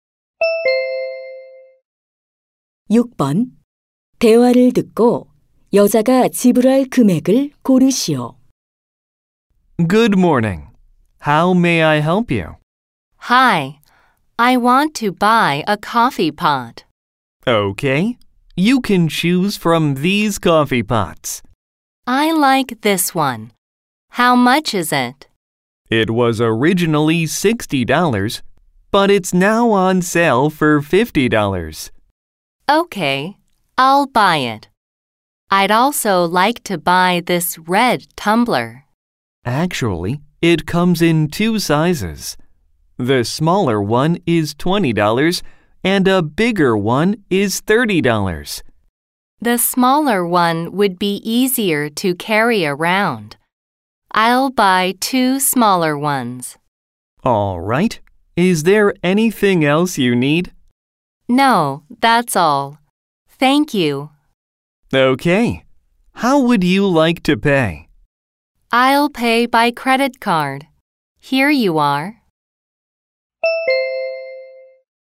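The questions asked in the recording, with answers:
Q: 대화를 듣고 여자가 지불할 금액을 고르시오.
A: $90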